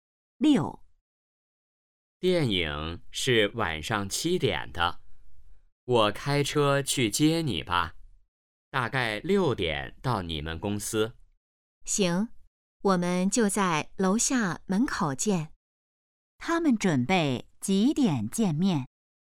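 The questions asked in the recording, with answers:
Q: 他们准备几点见面?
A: 6点左右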